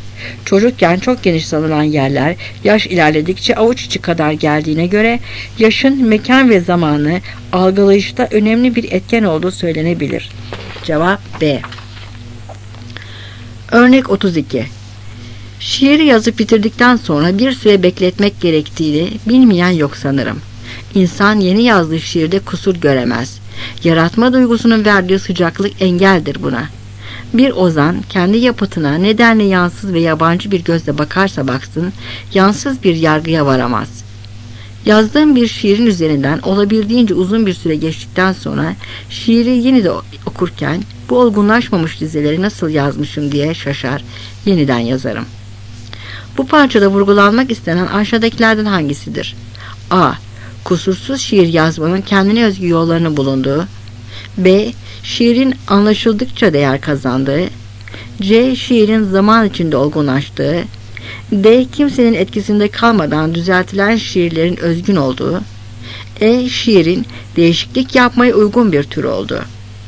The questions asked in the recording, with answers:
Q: Bu parçada vurgulanmak istenen aşağıdakilerden hangisidir?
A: Cevap C.